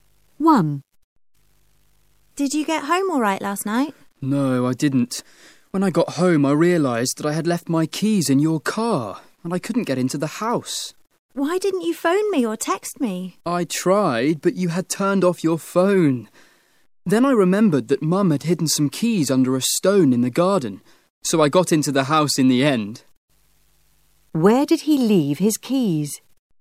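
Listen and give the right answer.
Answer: In your car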